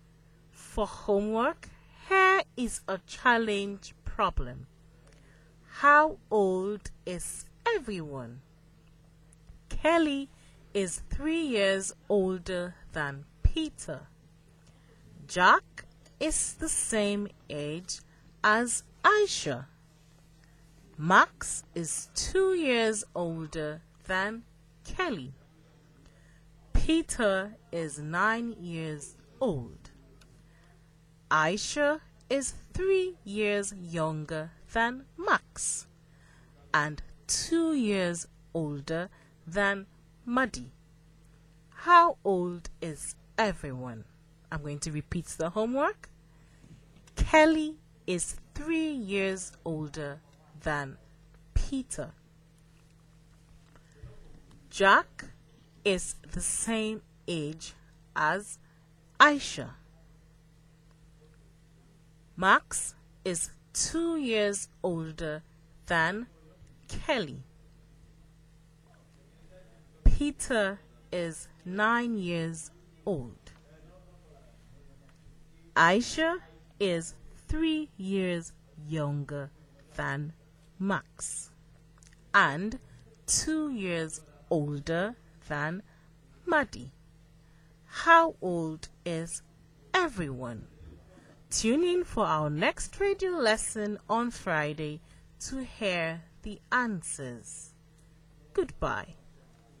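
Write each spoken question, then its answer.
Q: How old is everyone?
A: Peter 9, Kelly 12, Max 14, Aisha 11, Jack 11, Muddy 9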